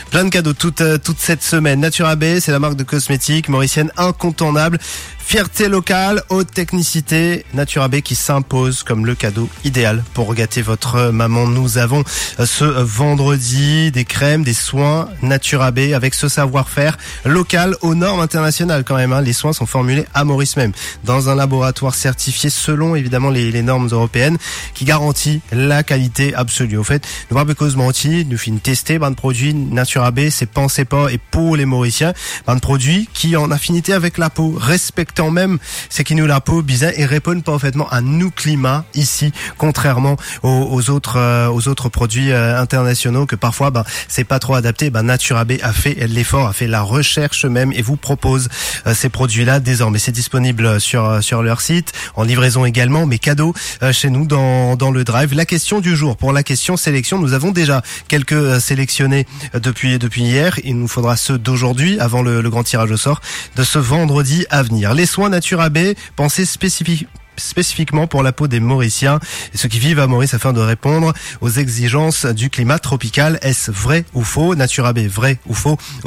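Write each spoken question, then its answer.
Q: Les soins Natura B, pensés spécifiquement pour la peau des Mauriciens et ceux qui vivent à Maurice afin de répondre aux exigences du climat tropical. Est-ce vrai ou faux?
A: Vrai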